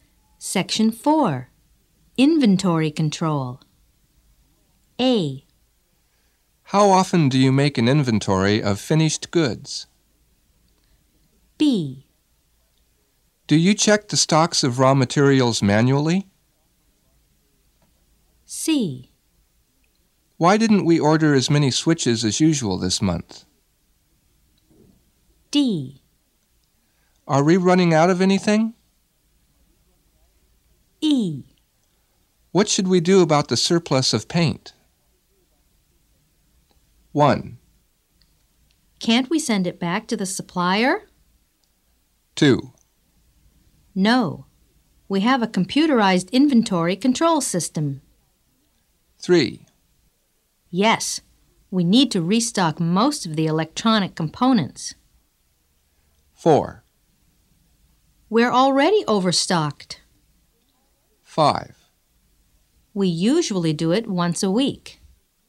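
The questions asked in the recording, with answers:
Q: How often do you make an inventory of finished goods?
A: 5: We usually do it once a week.

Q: Do you check the stocks of raw materials manually?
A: 2: No. We have a computerized inventory control system.

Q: Why didn't we order as many switches as usual this month?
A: 4: We're already overstocked.

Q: Are we running out of anything?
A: 3: Yes. We need to restock most of the electronic components.

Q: What should we do about the surplus of paint?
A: 1: Can't we send it back to the supplier?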